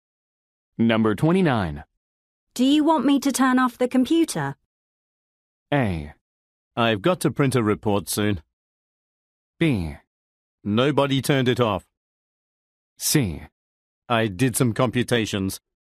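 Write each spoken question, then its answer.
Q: Do you want me to turn off the computer?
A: A: I've got to print a report soon.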